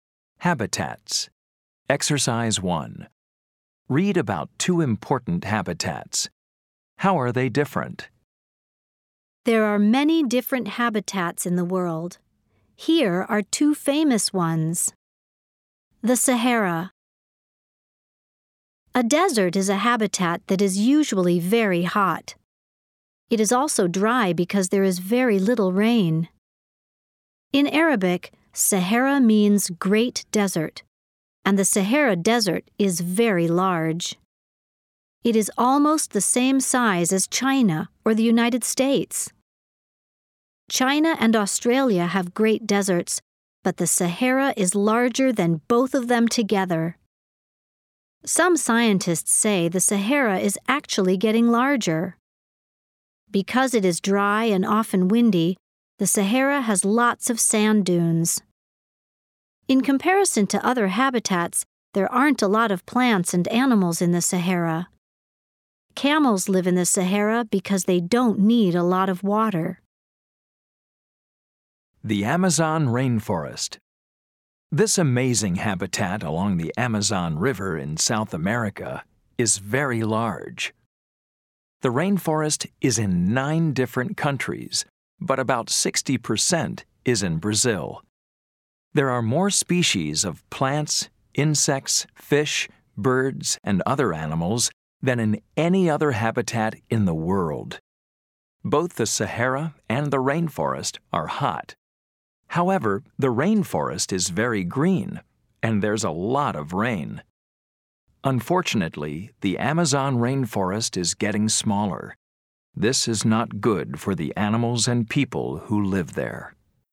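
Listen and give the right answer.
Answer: The Sahara is a dry desert with little rain and few plants and animals, and it is getting larger; the Amazon rainforest is green with lots of rain and more species than any other habitat, and it is getting smaller.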